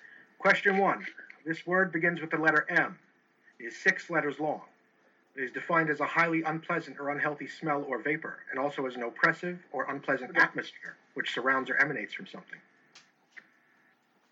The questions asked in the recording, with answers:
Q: This word begins with the letter M, it is six letters long.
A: the answer is miasma.